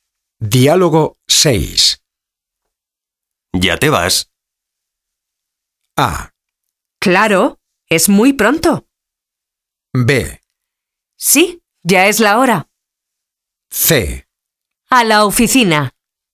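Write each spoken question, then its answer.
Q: ¿Ya te vas?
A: B: Sí, ya es la hora.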